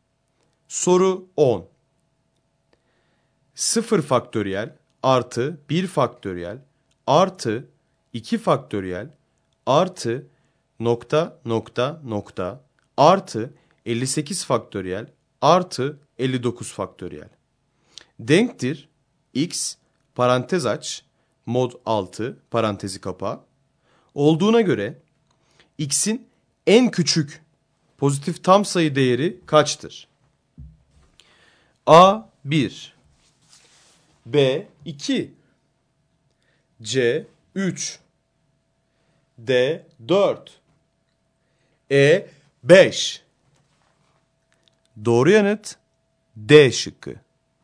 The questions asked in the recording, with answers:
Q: Olduğuna göre x'in en küçük pozitif tam sayı değeri kaçtır?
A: Doğru yanıt D şıkkı.